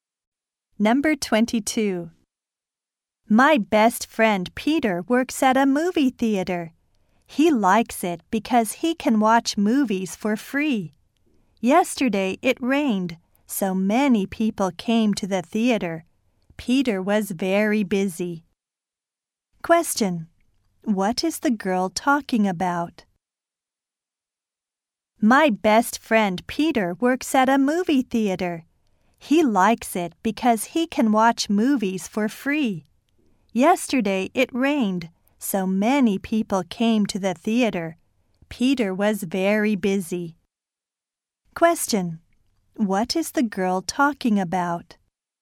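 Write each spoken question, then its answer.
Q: What is the girl talking about?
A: Her best friend's job at a movie theater.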